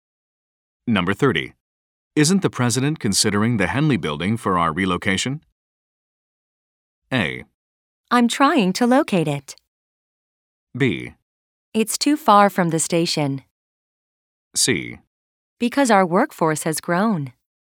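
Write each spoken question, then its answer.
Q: Isn't the president considering the Henley building for our relocation?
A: B: It's too far from the station.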